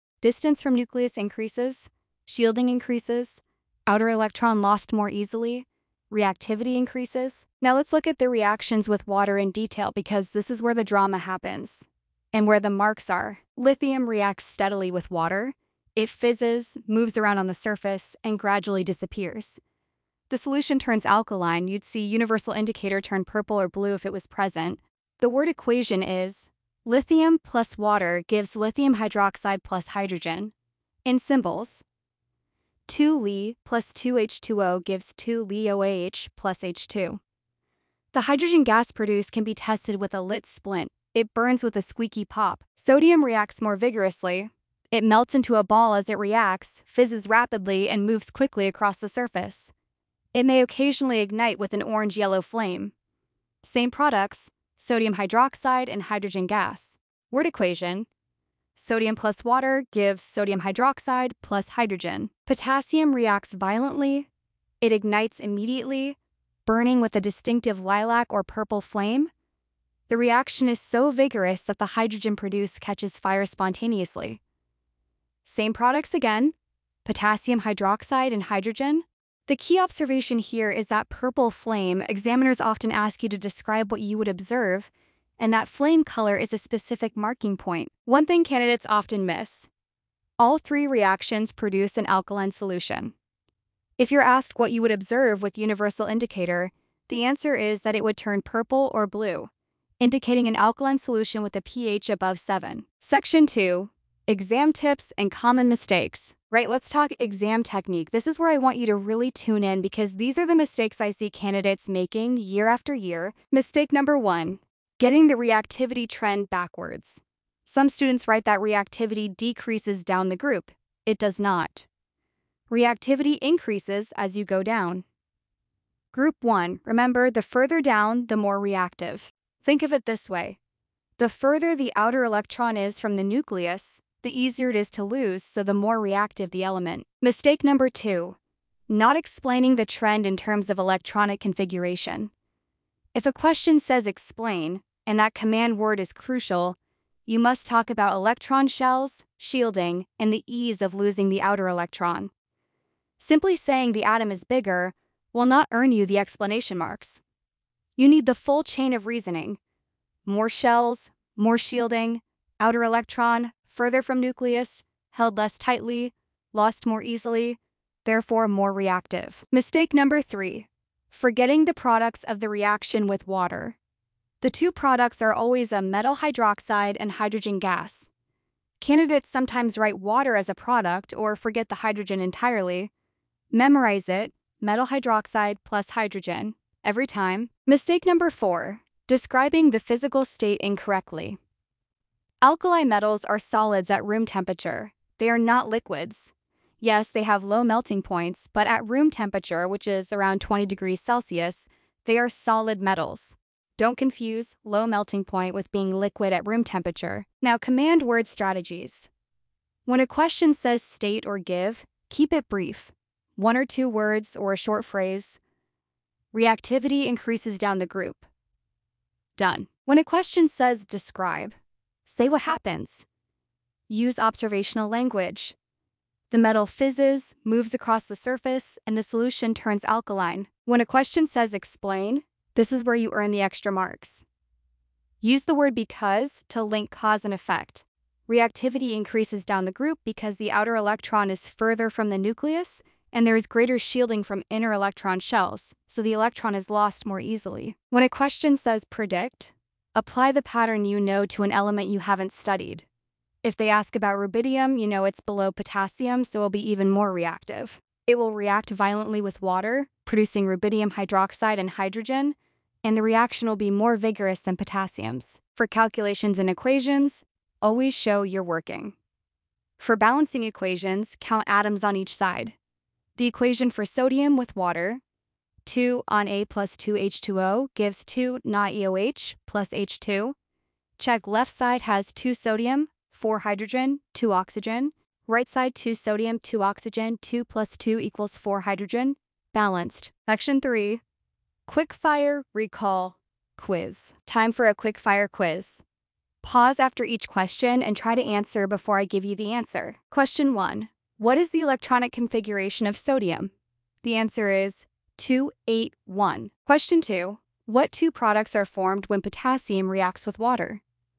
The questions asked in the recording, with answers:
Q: what two products are formed when potassium reacts with water?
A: Potassium hydroxide and hydrogen gas.